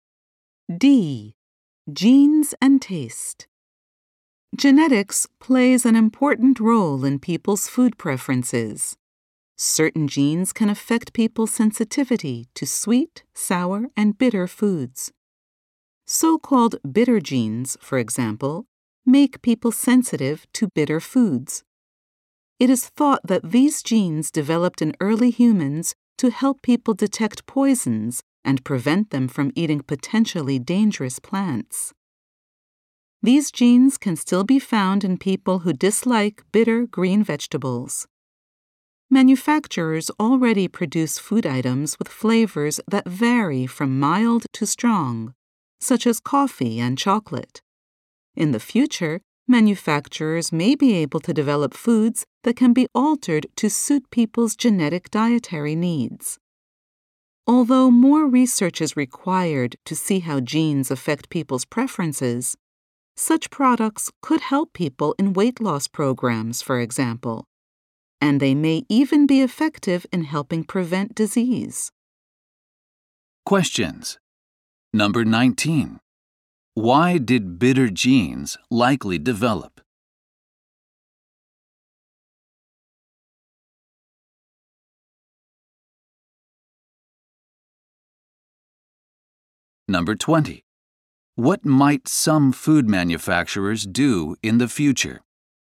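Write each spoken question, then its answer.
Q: Why did bitter genes likely develop?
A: To help early humans detect poisons and avoid dangerous plants

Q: What might some food manufacturers do in the future?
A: Develop foods that can be altered to suit people's genetic dietary needs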